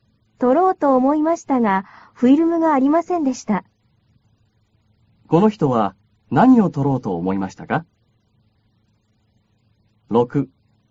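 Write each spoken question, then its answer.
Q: この人は何を取ろうと思いましたか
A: 写真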